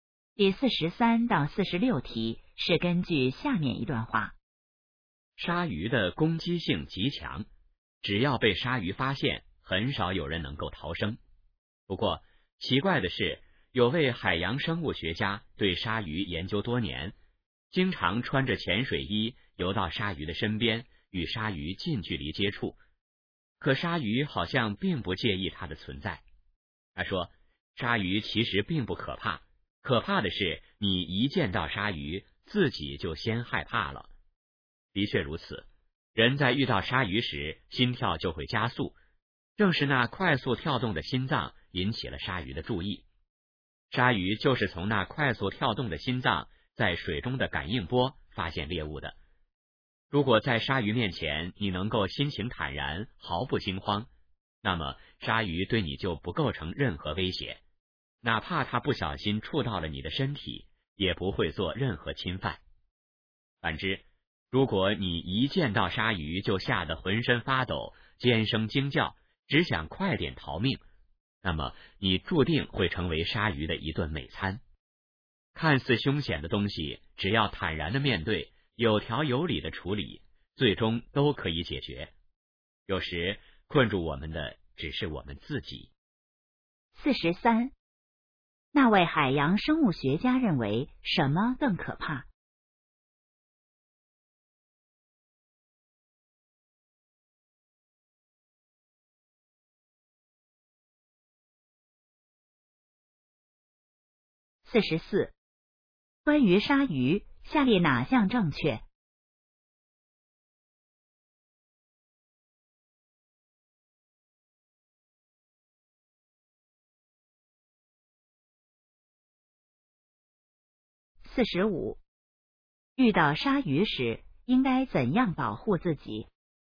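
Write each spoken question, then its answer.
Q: 那位海洋生物学家认为什么更可怕?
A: 见到鲨鱼自己先害怕

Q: 遇到鲨鱼时应该怎样保护自己?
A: 心情坦然,毫不惊慌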